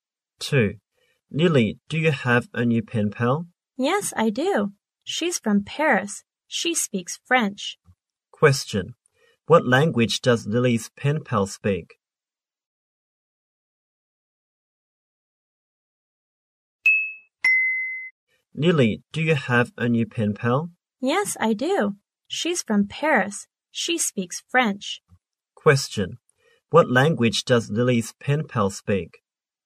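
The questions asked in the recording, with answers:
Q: What language does Lily's pen pal speak?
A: French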